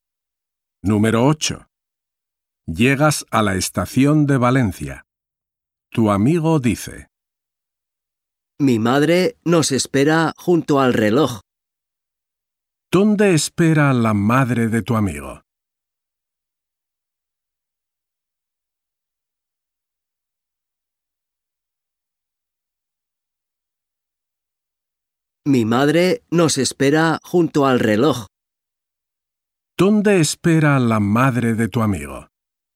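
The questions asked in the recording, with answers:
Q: ¿Dónde espera la madre de tu amigo?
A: Junto al reloj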